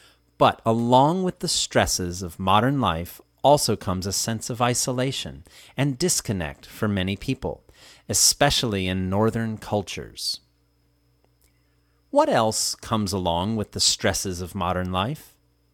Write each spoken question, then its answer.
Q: What else comes along with the stresses of modern life?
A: A sense of isolation and disconnect comes along with the stresses of modern life.